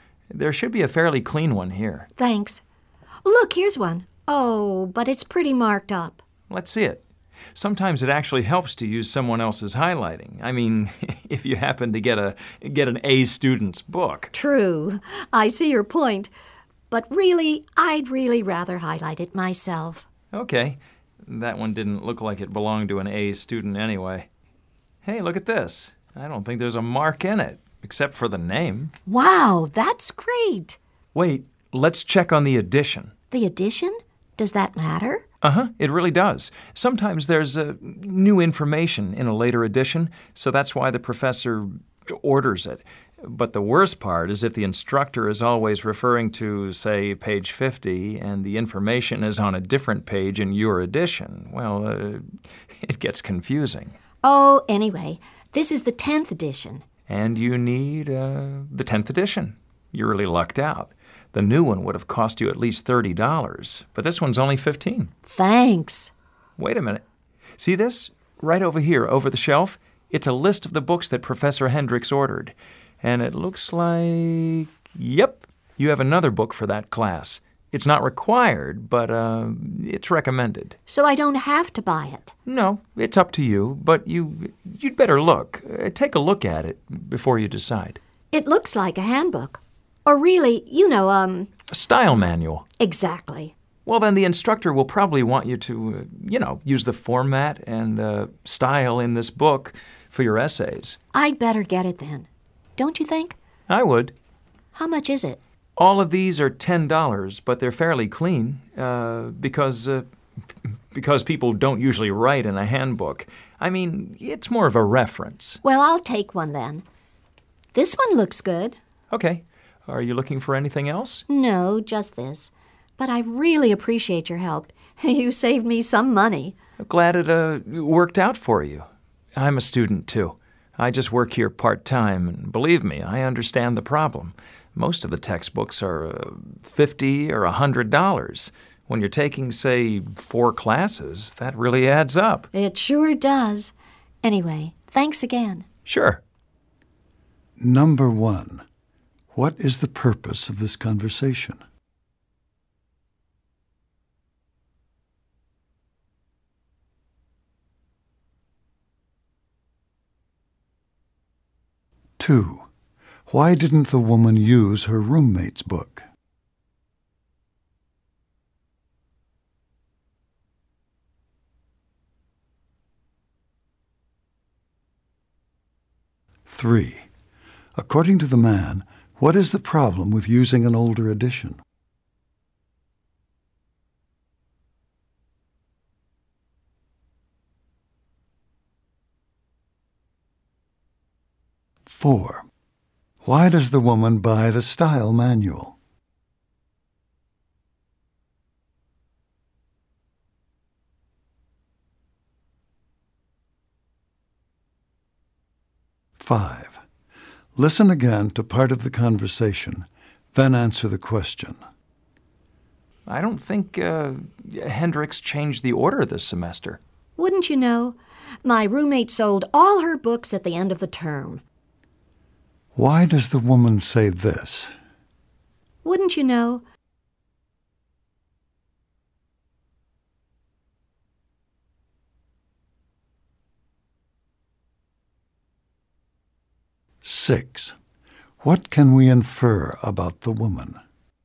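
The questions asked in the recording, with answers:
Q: Why didn't the woman use her roommate's book?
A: Her roommate sold all her books at the end of the term

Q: According to the man, what is the problem with using an older edition?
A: The information may be on different pages than the instructor refers to, and newer editions may have new information

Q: Why does the woman buy the style manual?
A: The instructor will probably want her to use its format and style for essays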